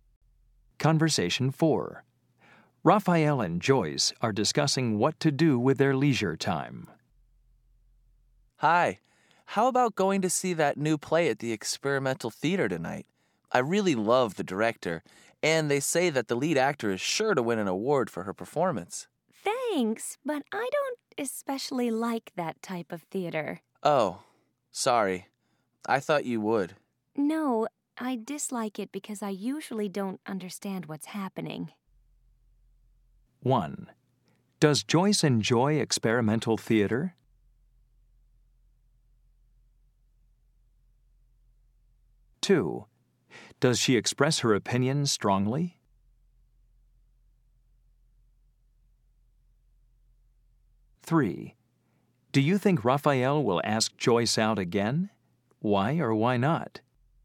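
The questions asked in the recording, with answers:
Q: Does Joyce enjoy experimental theater?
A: No

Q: Does she express her opinion strongly?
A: No, she softens it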